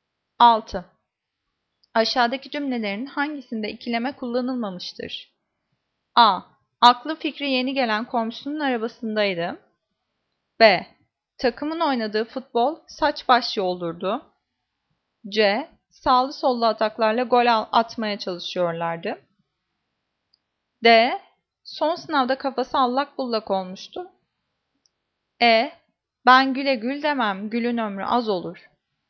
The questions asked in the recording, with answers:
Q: Aşağıdaki cümlelerin hangisinde ikileme kullanılmamıştır?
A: Cevap E. Ben güle gül demem, gülün ömrü az olur.